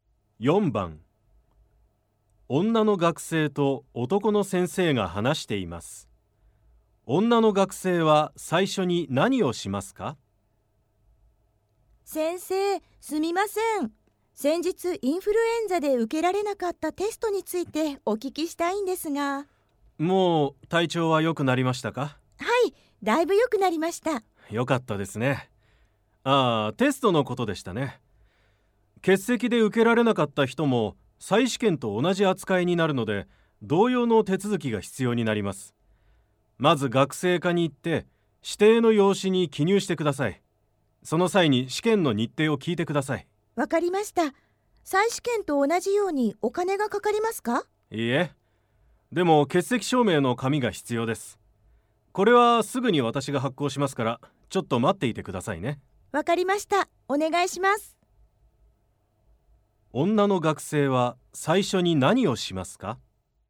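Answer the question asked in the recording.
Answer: 先生が欠席証明の紙を発行するのを待つ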